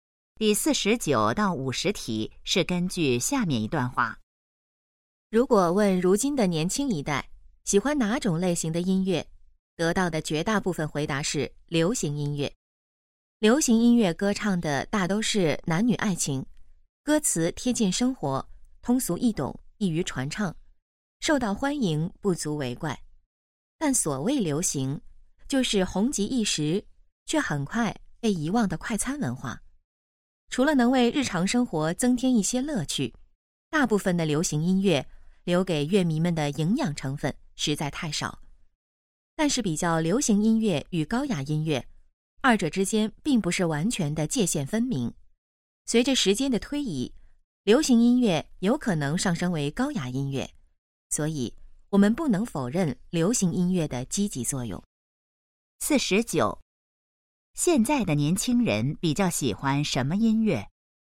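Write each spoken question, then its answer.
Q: 现在的年轻人比较喜欢什么音乐?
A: 流行音乐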